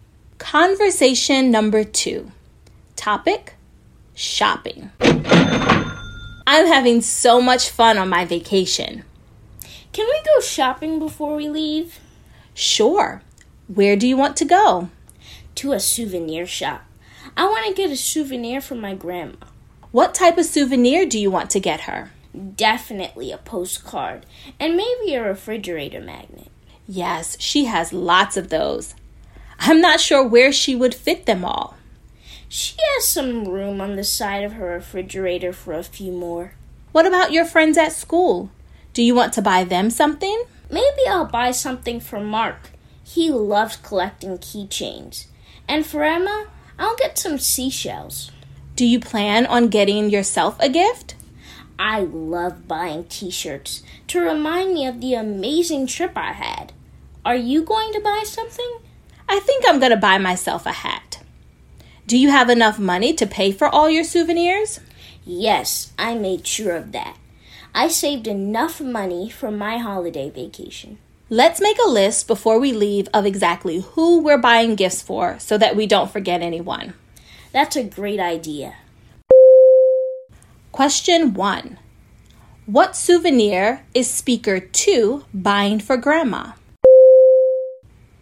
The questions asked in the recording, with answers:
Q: What souvenir is speaker two buying for grandma?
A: If you said postcard and refrigerator magnet, you are correct.